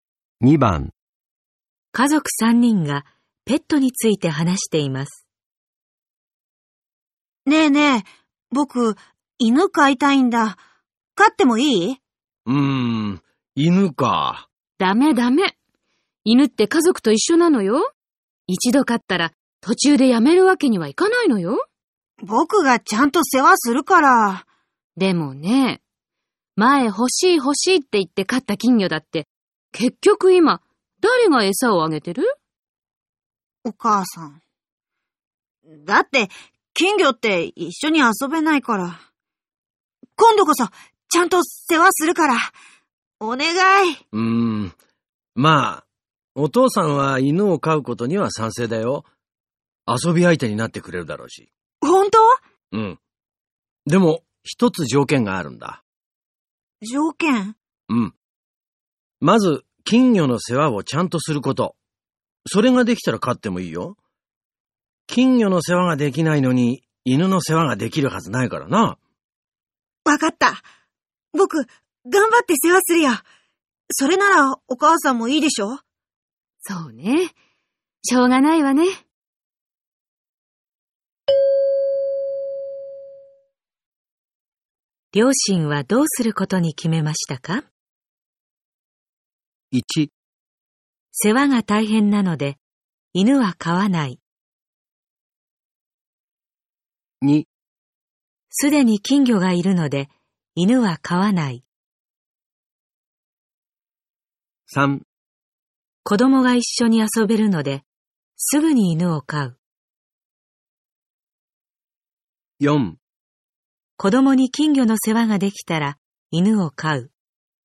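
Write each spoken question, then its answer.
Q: 両親はどうすることに決めましたか?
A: 4: 子供に金魚の世話ができたら、犬を飼う。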